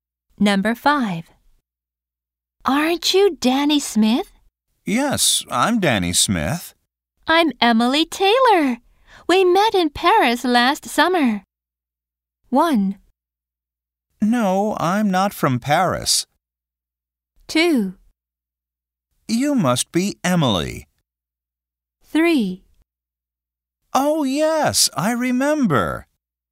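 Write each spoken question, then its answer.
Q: I'm Emily Taylor. We met in Paris last summer.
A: 3: Oh, yes, I remember.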